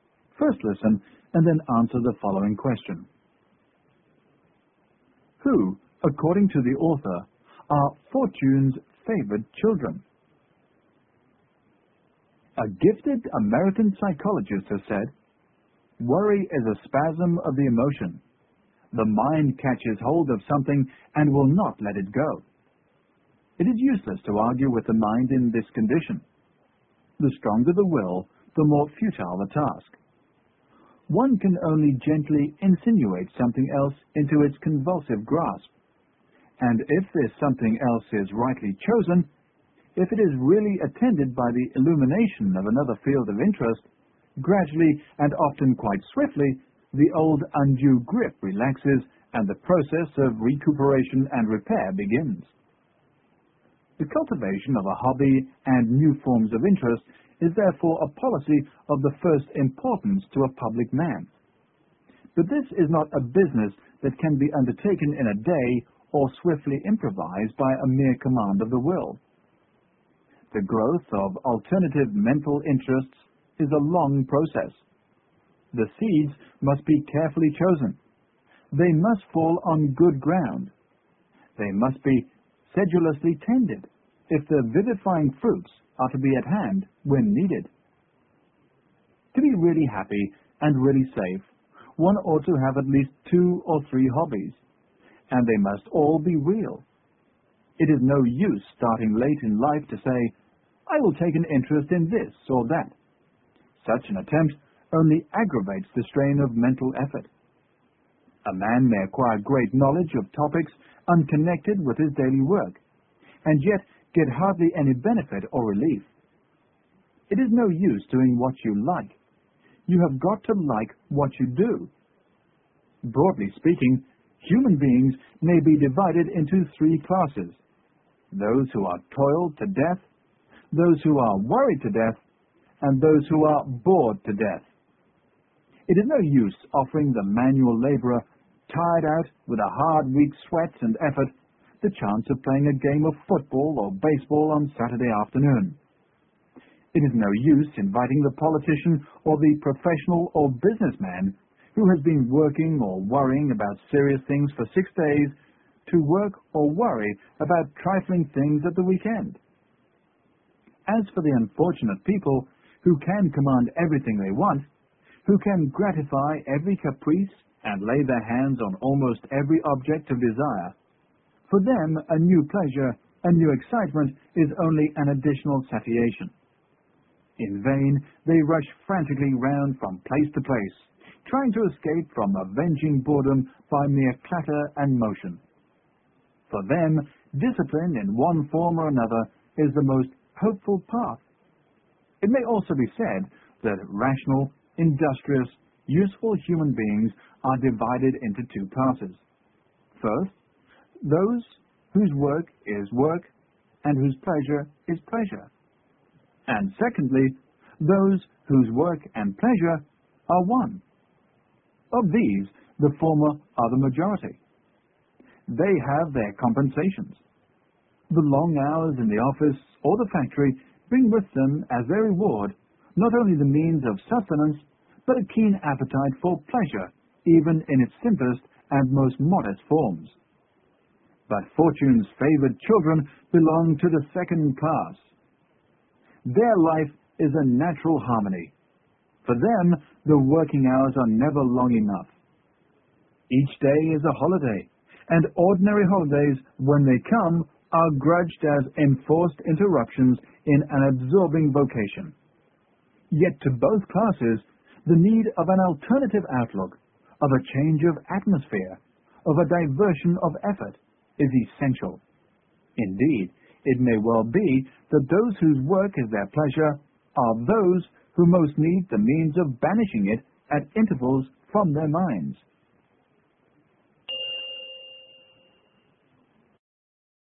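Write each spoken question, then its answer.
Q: Who, according to the author, are Fortune's favored children?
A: Those whose work and pleasure are one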